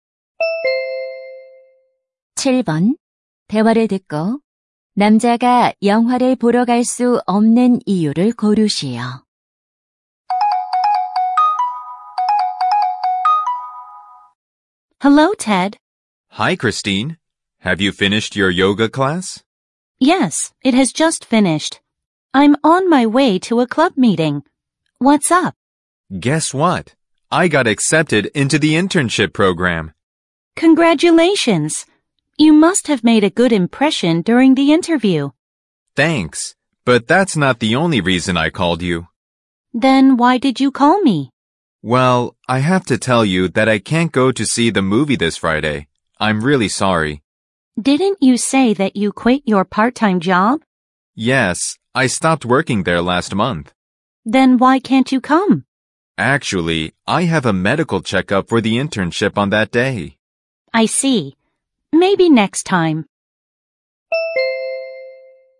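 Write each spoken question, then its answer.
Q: 대화를 듣고 남자가 영화를 보러 갈 수 없는 이유를 고르시오.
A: 인턴십 건강 검진이 있어서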